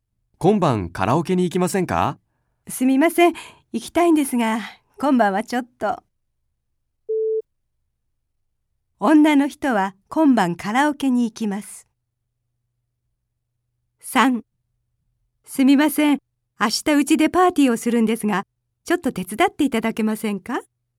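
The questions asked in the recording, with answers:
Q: 女の人は今晩カラオケに行きます。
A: 正しくない(×)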